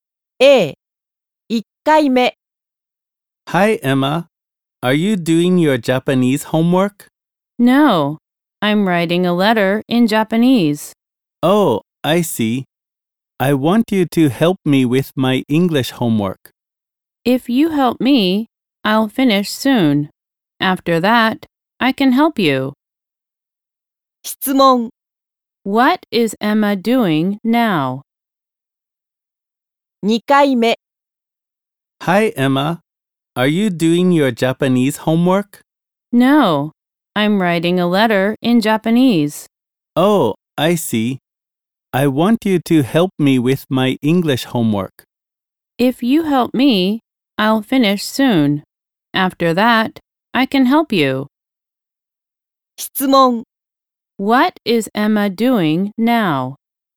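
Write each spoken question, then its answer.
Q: What is Emma doing now?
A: She is writing a letter in Japanese.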